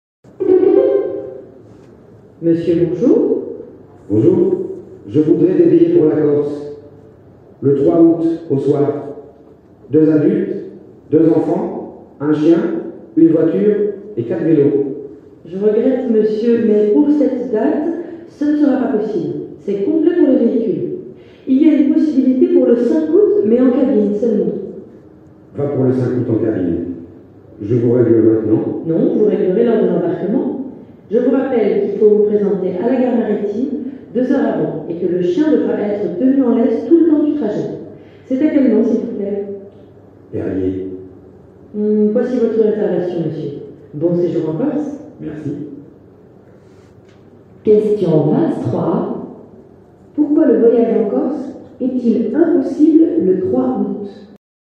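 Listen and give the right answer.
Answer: C'est complet pour les véhicules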